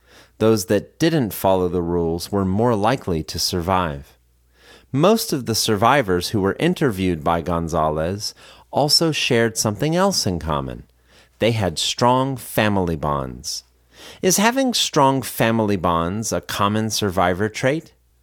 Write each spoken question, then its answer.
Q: Is having strong family bonds a common survivor trait?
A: Yes, having strong family bonds is a common survivor trait.